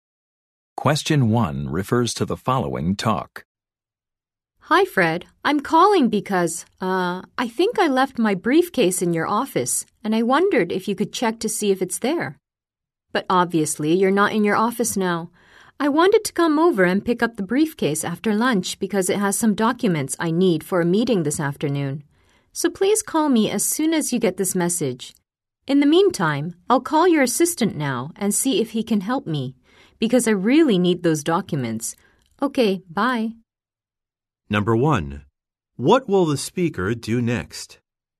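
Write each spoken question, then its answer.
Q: What will the speaker do next?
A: Call Fred's assistant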